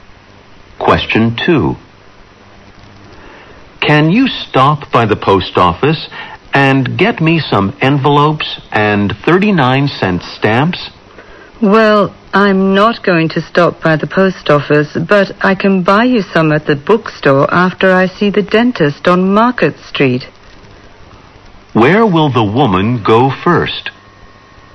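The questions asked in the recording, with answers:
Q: Where will the woman go first?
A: To the dentist on Market Street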